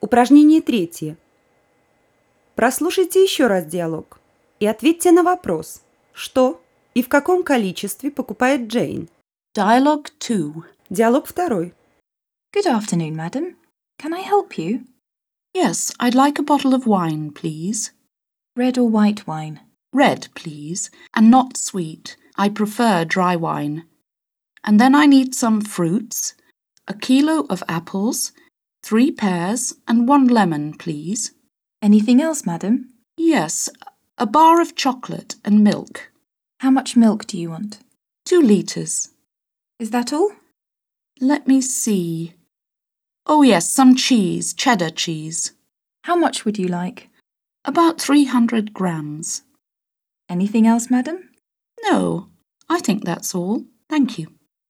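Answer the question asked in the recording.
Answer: Бутылку сухого красного вина, килограмм яблок, 3 груши, 1 лимон, плитку шоколада, 2 литра молока и около 300 граммов сыра чеддер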